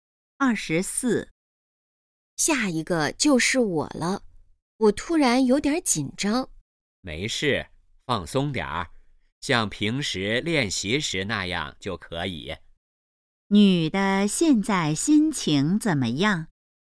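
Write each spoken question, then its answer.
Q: 女的现在心情怎么样?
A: 紧张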